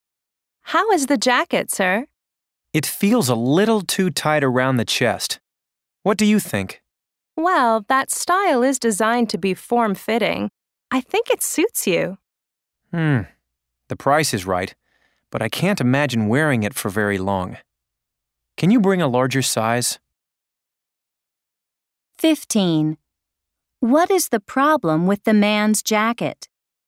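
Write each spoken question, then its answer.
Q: What is the problem with the man's jacket?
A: It is too tight around the chest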